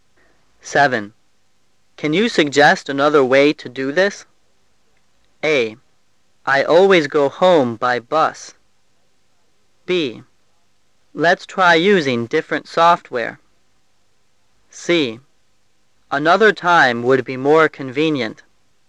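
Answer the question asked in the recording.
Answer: B: Let's try using different software.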